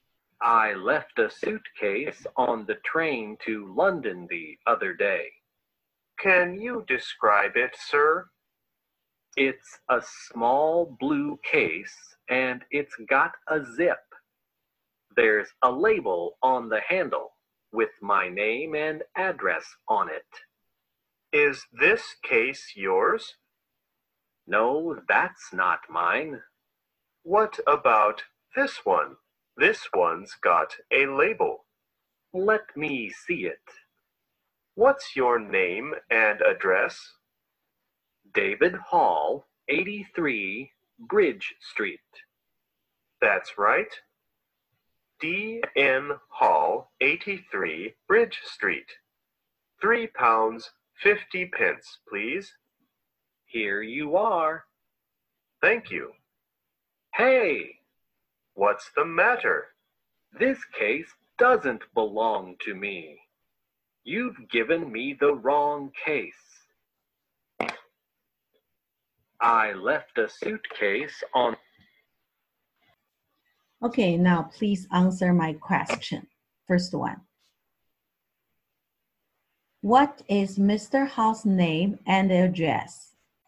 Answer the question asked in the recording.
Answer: It's David Hall, 83 Bridge Street.